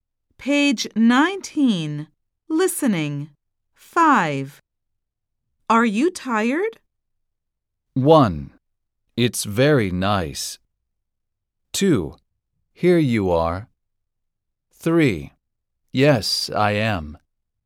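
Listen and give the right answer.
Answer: 3: Yes, I am.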